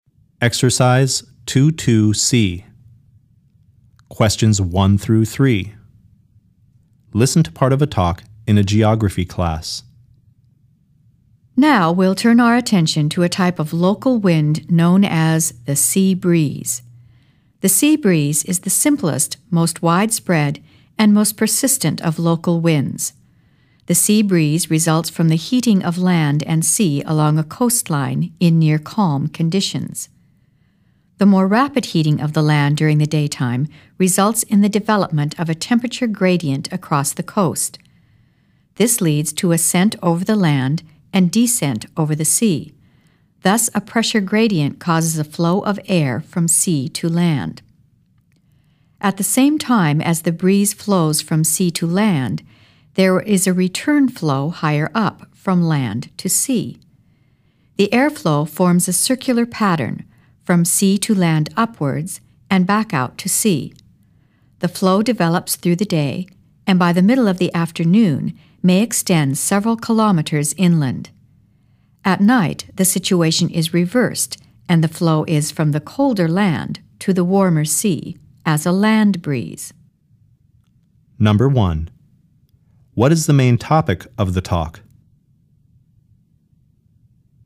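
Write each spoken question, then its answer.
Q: What is the main topic of the talk?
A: The sea breeze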